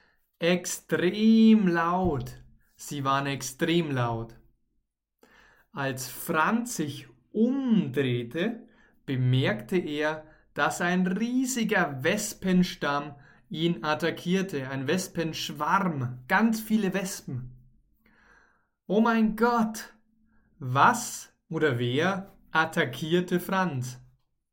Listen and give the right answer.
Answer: Ein riesiger, riesiger Wespenschwarm.